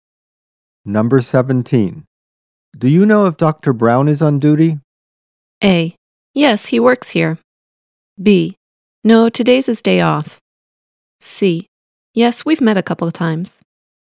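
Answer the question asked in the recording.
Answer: B: No, today's his day off.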